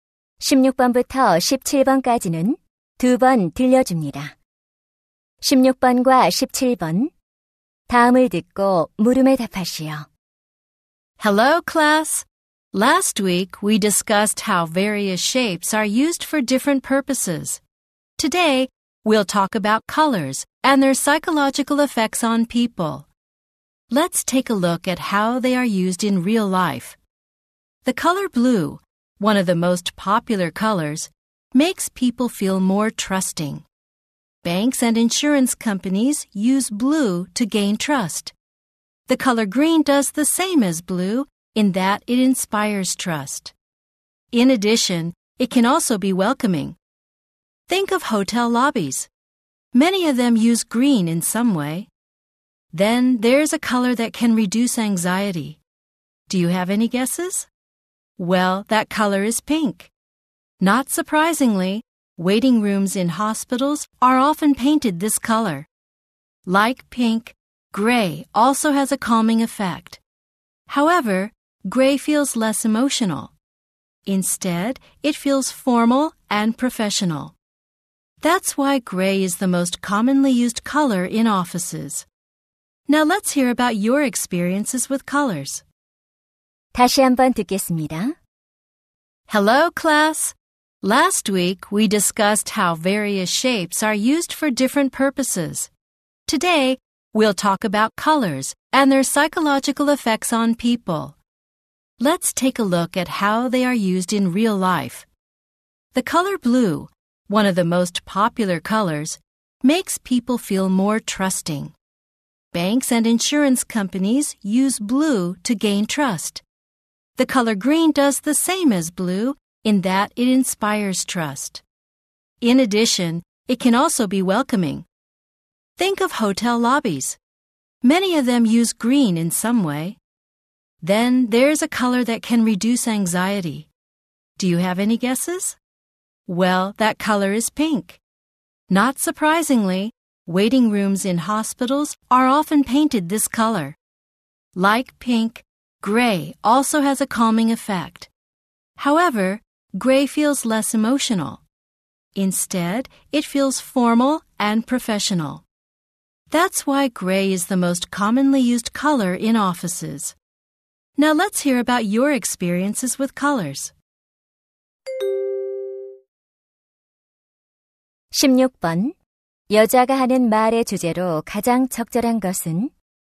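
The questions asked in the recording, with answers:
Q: 여자가 하는 말의 주제로 가장 적절한 것은?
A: 색깔이 사람에게 주는 심리적 효과와 그 활용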